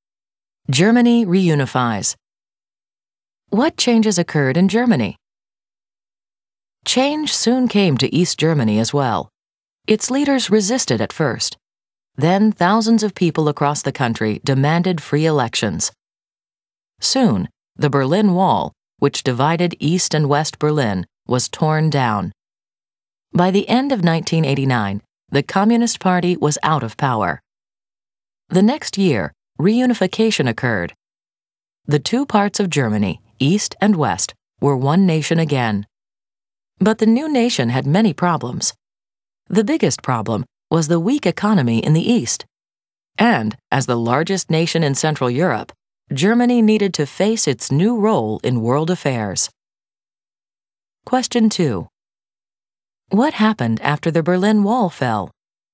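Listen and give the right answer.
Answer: The Communist Party lost power and Germany reunified, but faced a weak eastern economy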